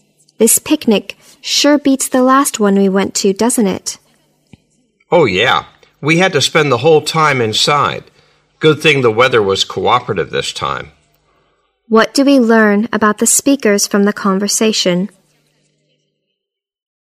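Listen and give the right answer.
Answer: They are enjoying this picnic more than the last one, which was spoiled by bad weather and kept them inside.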